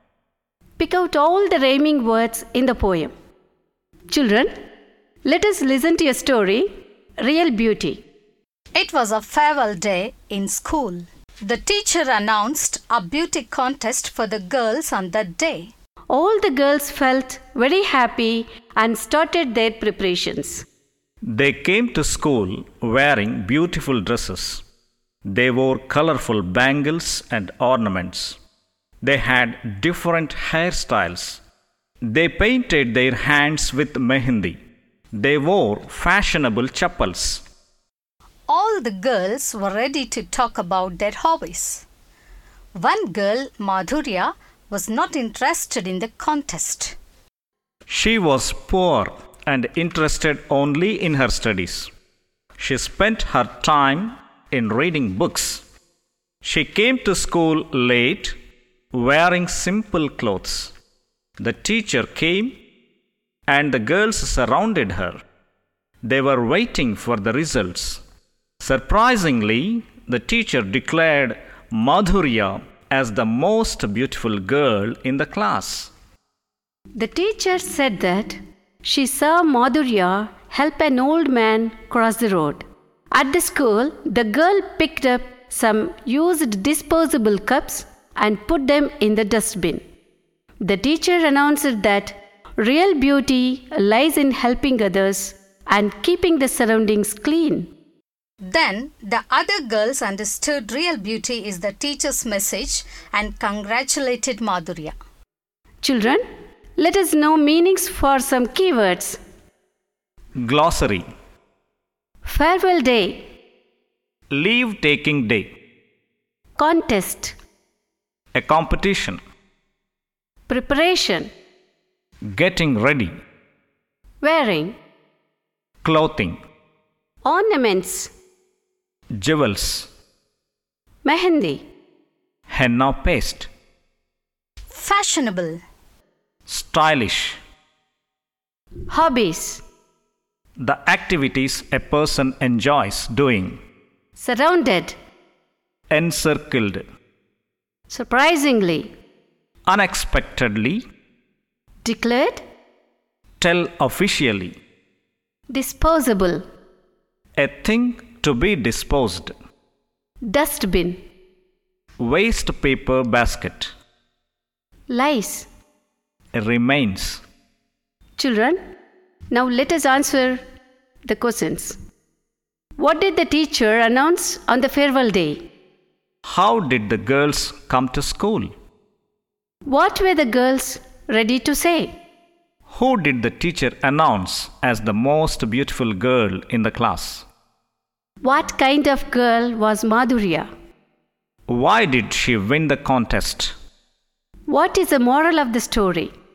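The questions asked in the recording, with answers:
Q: What did the teacher announce on the farewell day?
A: A beauty contest for the girls

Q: How did the girls come to school?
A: Wearing beautiful dresses, colorful bangles and ornaments

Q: What were the girls ready to say?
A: To talk about their hobbies

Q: Who did the teacher announce as the most beautiful girl in the class?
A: Madhurya

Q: What kind of girl was Madhurya?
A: Poor and interested only in her studies

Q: Why did she win the contest?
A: She helped an old man cross the road and put used cups in the dustbin

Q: What is the moral of the story?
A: Real beauty lies in helping others and keeping the surroundings clean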